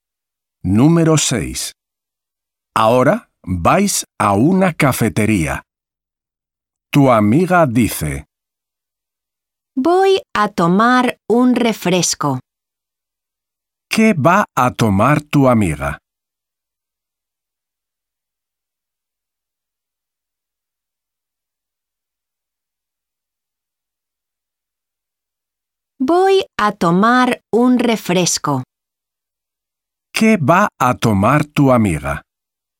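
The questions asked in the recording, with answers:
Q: ¿Qué va a tomar tu amiga?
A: un refresco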